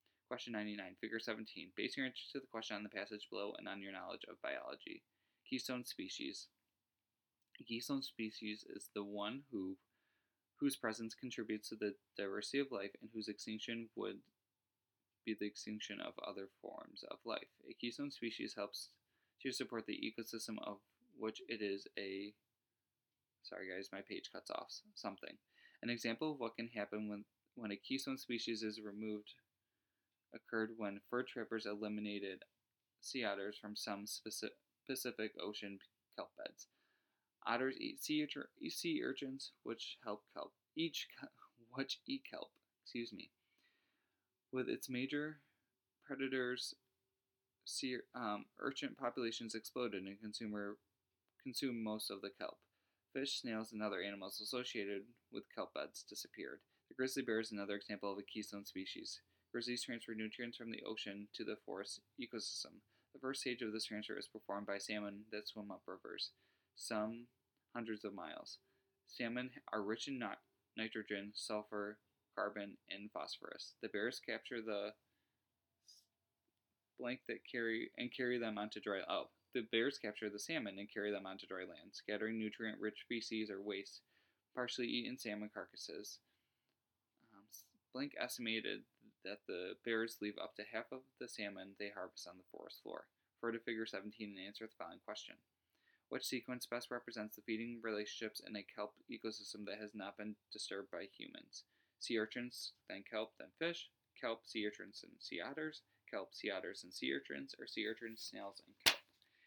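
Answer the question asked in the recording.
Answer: 2: kelp, sea urchins, and sea otters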